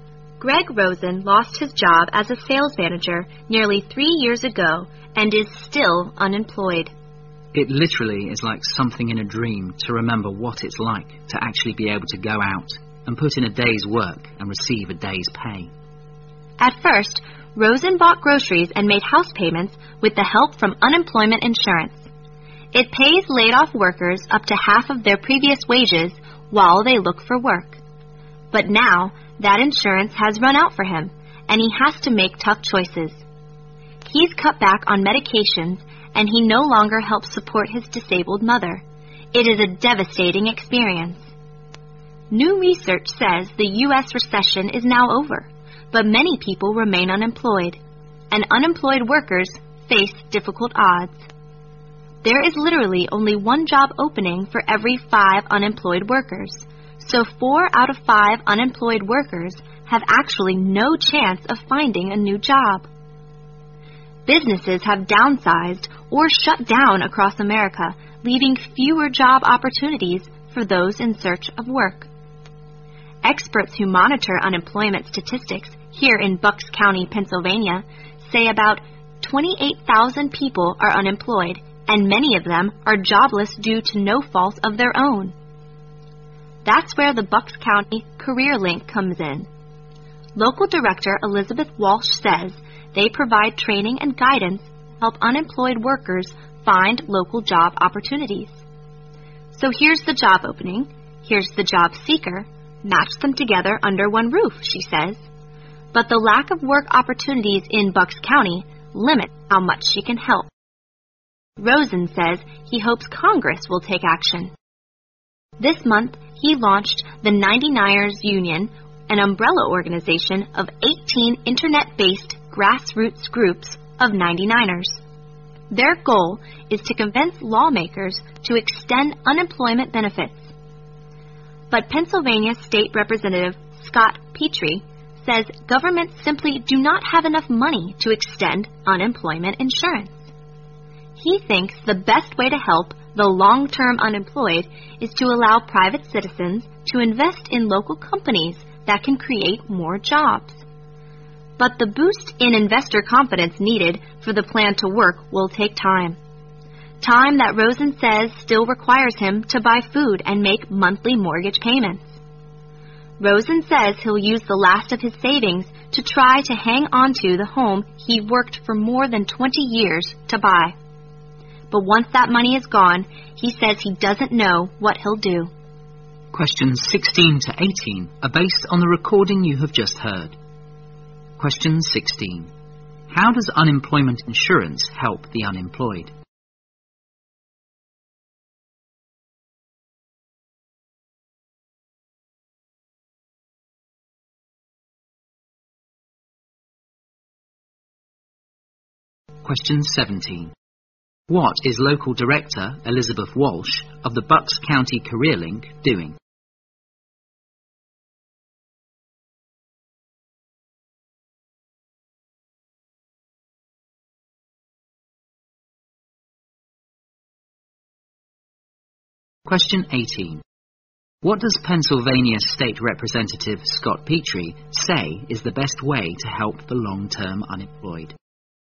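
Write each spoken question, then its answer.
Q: How does unemployment insurance help the unemployed?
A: It pays them up to half of their previous wages while they look for work

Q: What is Local Director Elizabeth Walsh of the Bucks County Career Link doing?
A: Giving training and guidance to help unemployed workers find local jobs

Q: What does Pennsylvania State Representative Scott Petrie say is the best way to help the long-term unemployed?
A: Let private citizens invest in local companies that can create more jobs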